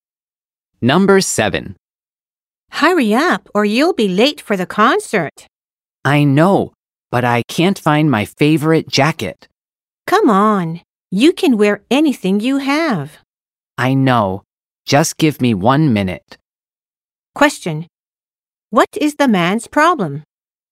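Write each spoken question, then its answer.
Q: What is the man's problem?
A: He can't find his favorite jacket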